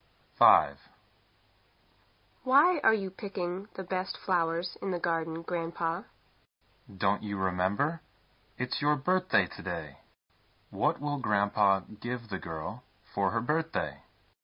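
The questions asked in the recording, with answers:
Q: What will Grandpa give the girl for her birthday?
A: The best flowers from the garden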